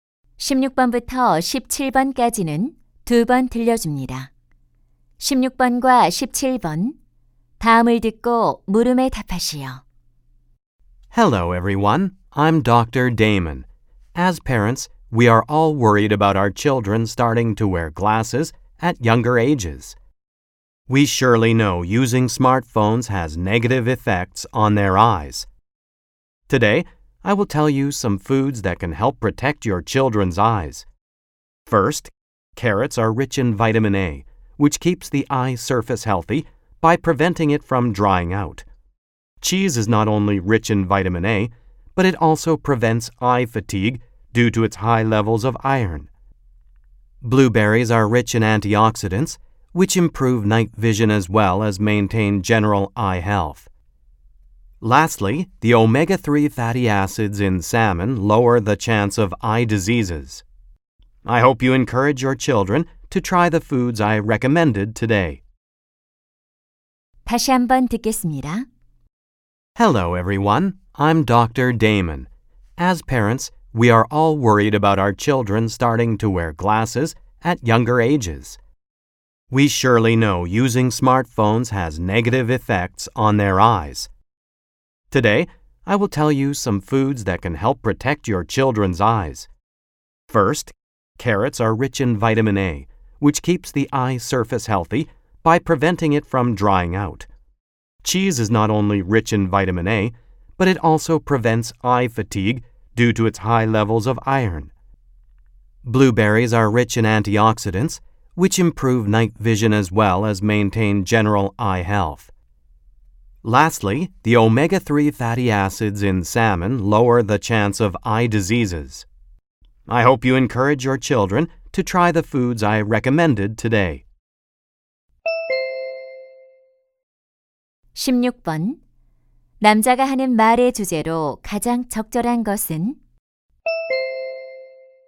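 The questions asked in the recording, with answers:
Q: 남자가 하는 말의 주제로 가장 적절한 것은?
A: 아이들의 눈 건강에 도움이 되는 음식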